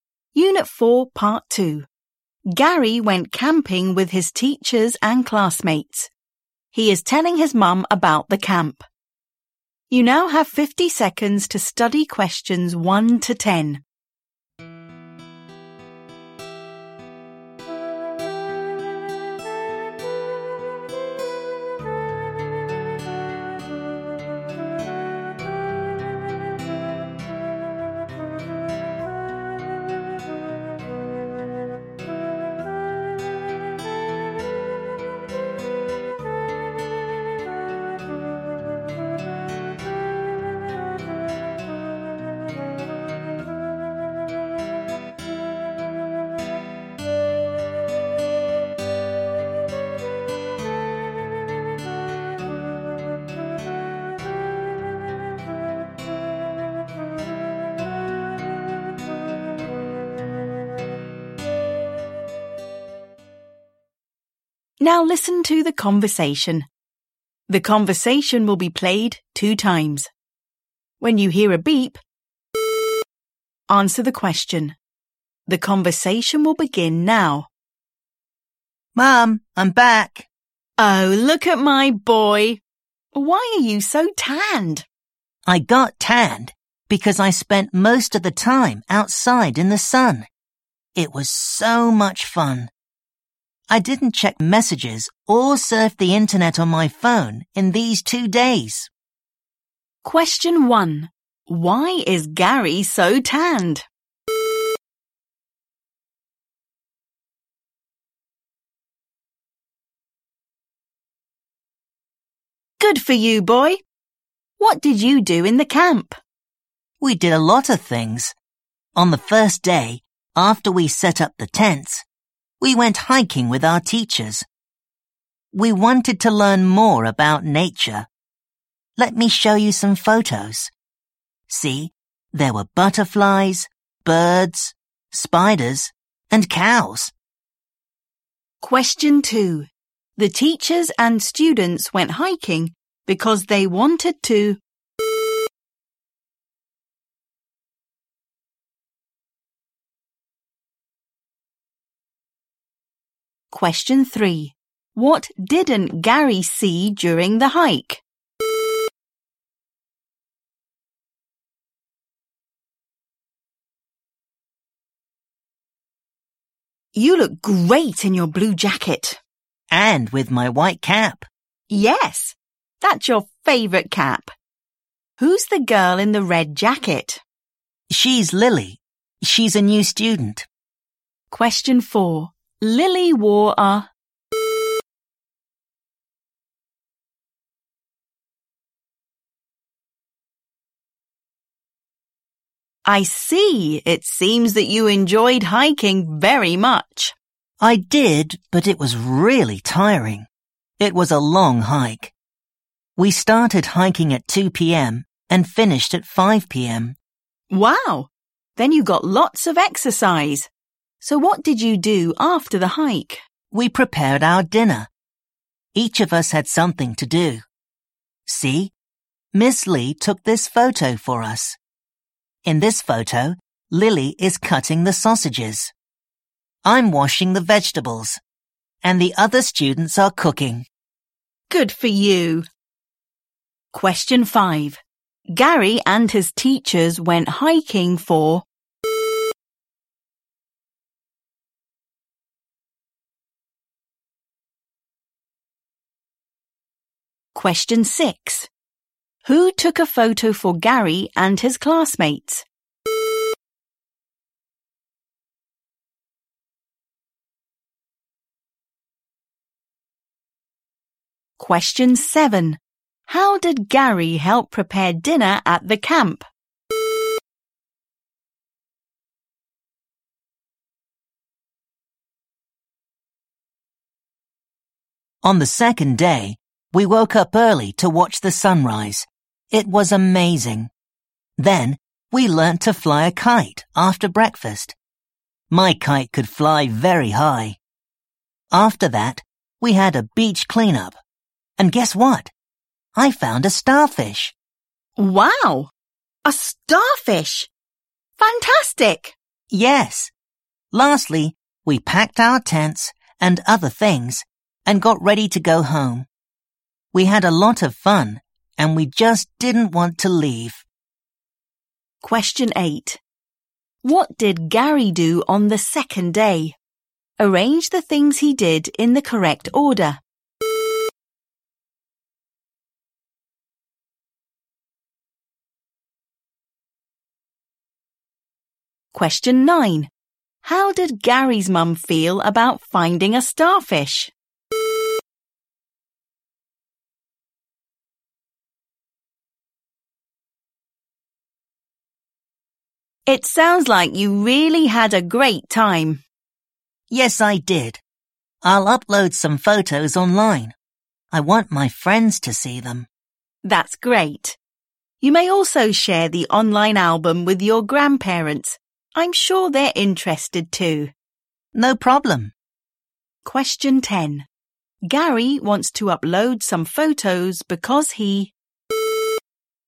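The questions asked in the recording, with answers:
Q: Why is Gary so tanned?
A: He spent most of the time outside in the sun.

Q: The teachers and students went hiking because they wanted to...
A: learn more about nature

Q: Lily wore a...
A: red jacket

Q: Gary and his teachers went hiking for...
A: three hours

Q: Who took a photo for Gary and his classmates?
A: Miss Lee

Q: How did Gary help prepare dinner at the camp?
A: He washed the vegetables.

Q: What did Gary do on the second day?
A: Watched the sunrise, learnt to fly a kite, had a beach cleanup, packed the tents

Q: How did Gary's mum feel about finding a starfish?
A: She thought it was fantastic (excited).

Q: Gary wants to upload some photos because he...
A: wants his friends to see them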